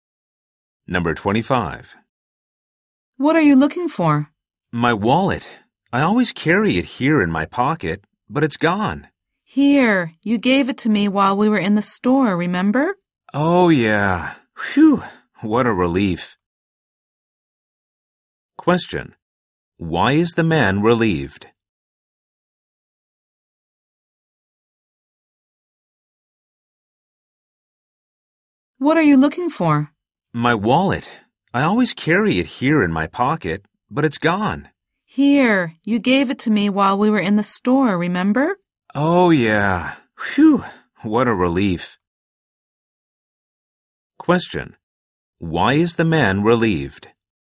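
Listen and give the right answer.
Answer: The woman has his wallet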